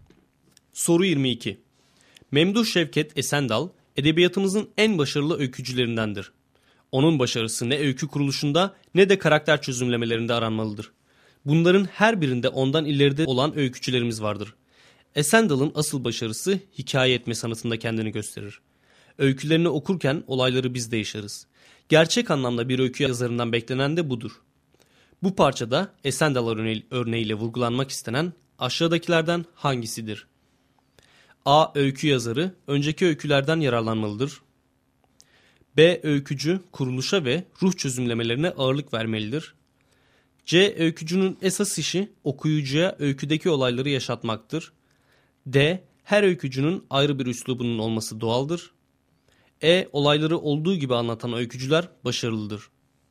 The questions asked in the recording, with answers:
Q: Bu parçada Esendal örneğiyle vurgulanmak istenen aşağıdakilerden hangisidir?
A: Doğru cevap C şıkkı.